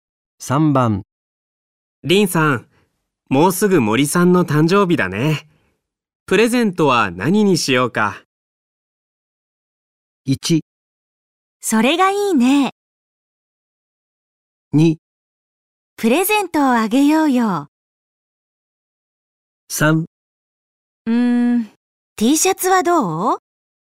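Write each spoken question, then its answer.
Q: リンさん、もうすぐ森さんの誕生日だね。プレゼントは何にしようか。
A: 3: Tシャツはどう?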